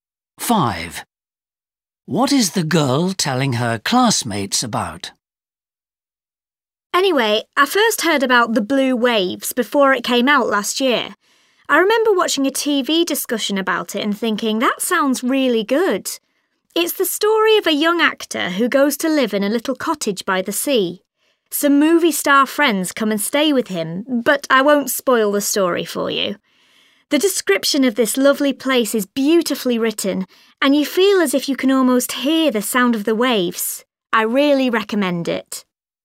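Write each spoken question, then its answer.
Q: What is the girl telling her classmates about?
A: A book, The Blue Waves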